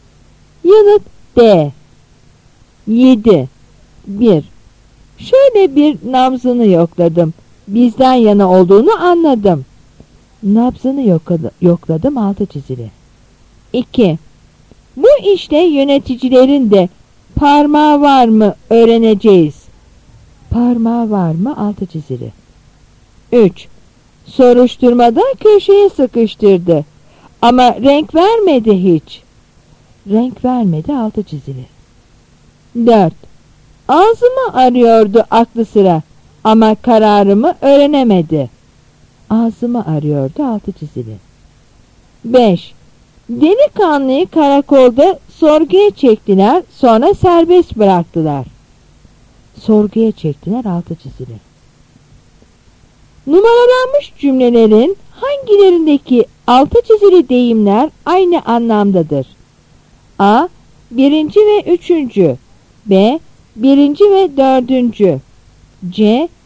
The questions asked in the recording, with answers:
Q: Numaralanmış cümlelerin hangilerindeki altı çizili deyimler aynı anlamdadır?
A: Yanıt B.